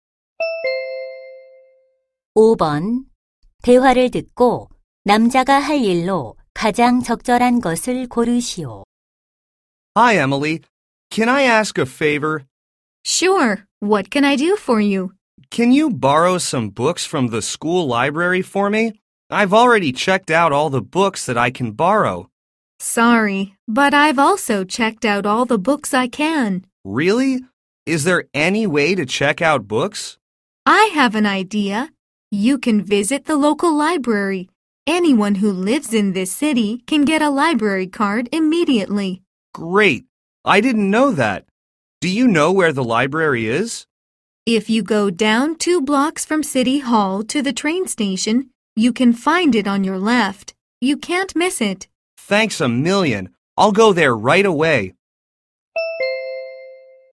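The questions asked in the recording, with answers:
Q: 대화를 듣고 남자가 할 일로 가장 적절한 것을 고르시오.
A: 지역 도서관에 가기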